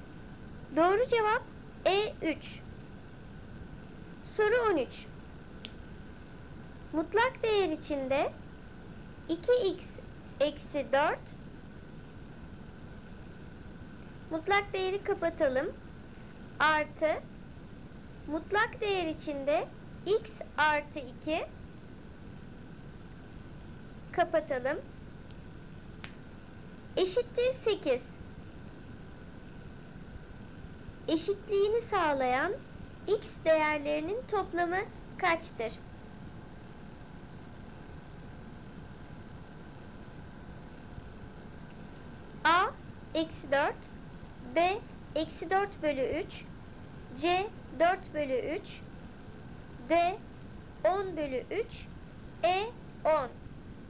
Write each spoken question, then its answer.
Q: Eşitliğini sağlayan x değerlerinin toplamı kaçtır?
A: Doğru cevap C 4 bölü 3.